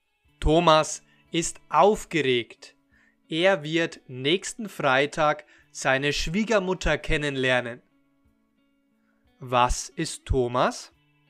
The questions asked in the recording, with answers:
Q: Was ist Thomas?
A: Aufgeregt. Thomas ist aufgeregt.